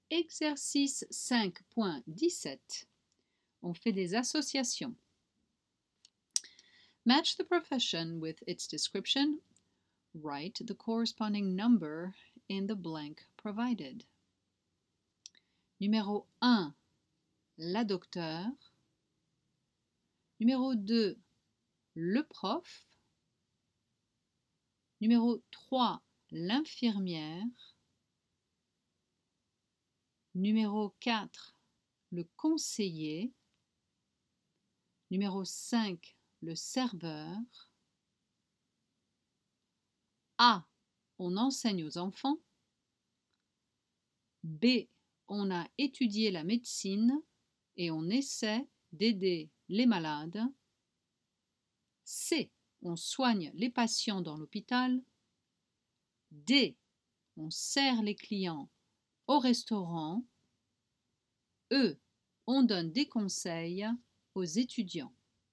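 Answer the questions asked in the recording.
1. B: on a étudié la médecine et on essaie d'aider les malades
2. A: on enseigne aux enfants
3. C: on soigne les patients dans l'hôpital
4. E: on donne des conseils aux étudiants
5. D: on sert les clients au restaurant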